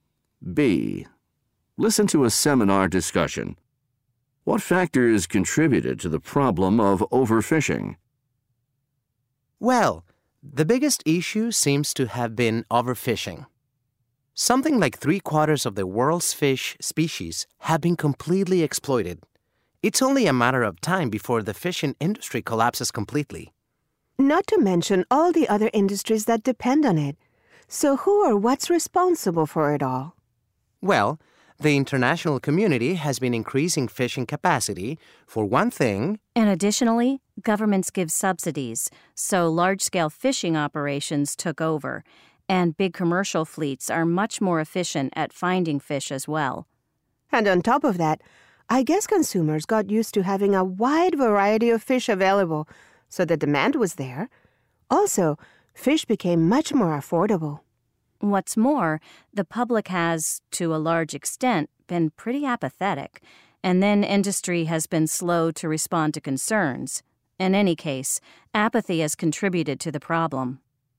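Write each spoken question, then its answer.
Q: What factors contributed to the problem of overfishing?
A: Increased international fishing capacity, government subsidies, efficient large commercial fleets, consumer demand for a variety of affordable fish, public apathy and slow industry response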